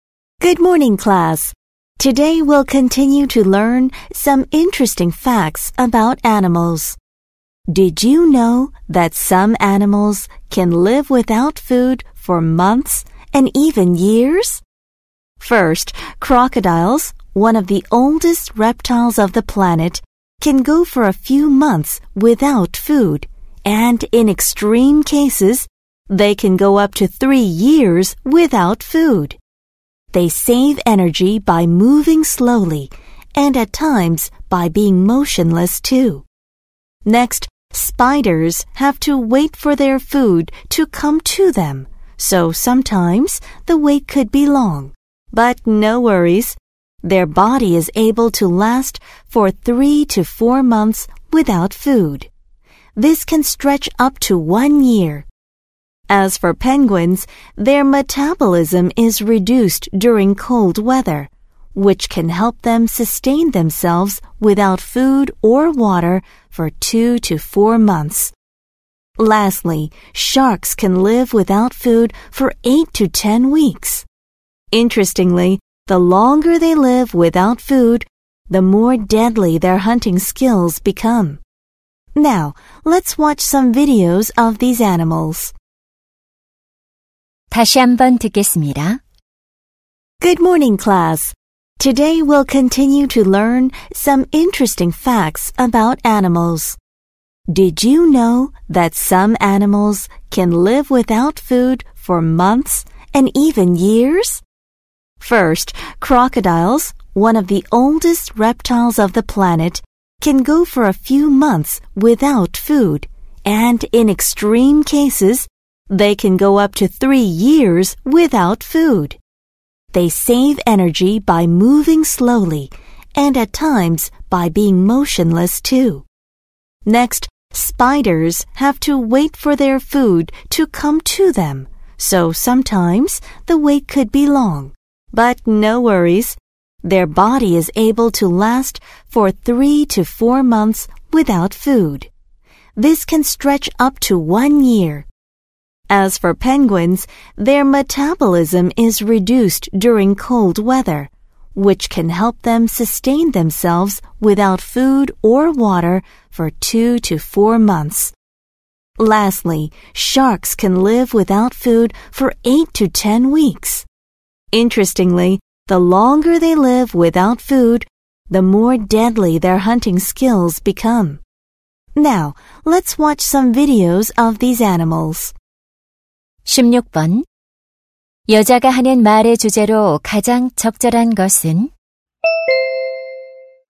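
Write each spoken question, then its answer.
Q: 여자가 하는 말의 주제로 가장 적절한 것은?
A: 오랫동안 먹이 없이 살 수 있는 동물들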